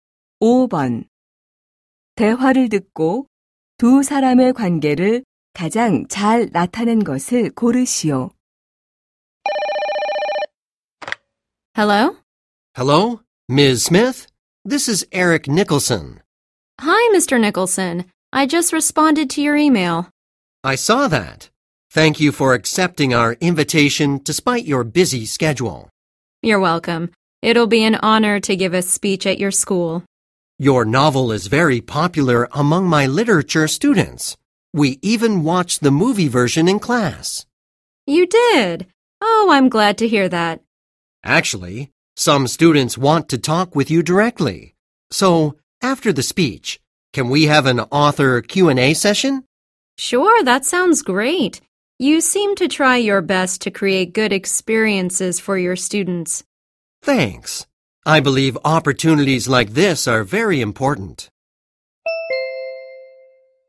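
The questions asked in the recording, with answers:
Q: 대화를 듣고 두 사람의 관계를 가장 잘 나타낸 것을 고르시오.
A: 교사 - 소설가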